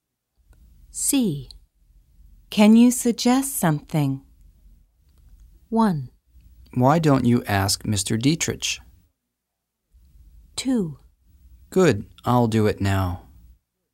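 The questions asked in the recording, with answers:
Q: Can you suggest something?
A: 1: Why don't you ask Mr. Dietrich?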